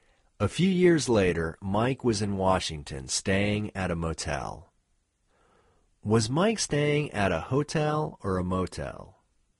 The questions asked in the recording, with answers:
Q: Was Mike staying at a hotel or a motel?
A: Mike was staying at a motel.